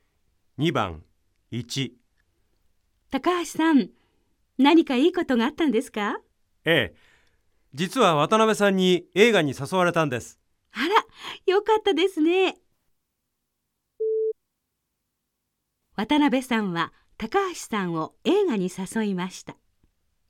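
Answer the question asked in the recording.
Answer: 正しい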